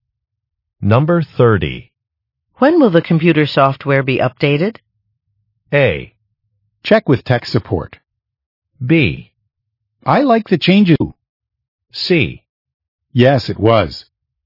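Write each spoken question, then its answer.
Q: When will the computer software be updated?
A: A: Check with tech support.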